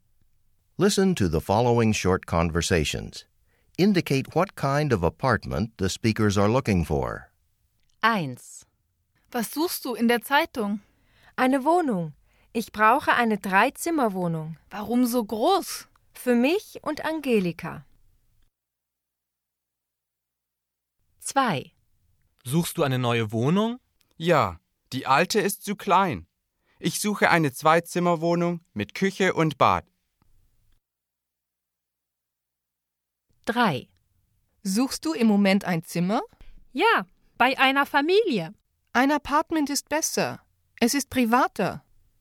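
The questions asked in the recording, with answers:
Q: Indicate what kind of apartment the speakers are looking for.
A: Eine Dreizimmerwohnung

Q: Indicate what kind of apartment the speakers are looking for.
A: Eine Zweizimmerwohnung mit Küche und Bad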